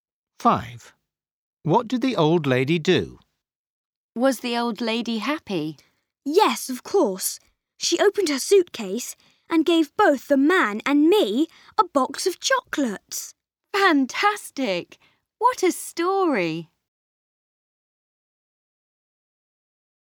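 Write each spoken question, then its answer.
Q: What did the old lady do?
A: She gave the man and Max a box of chocolates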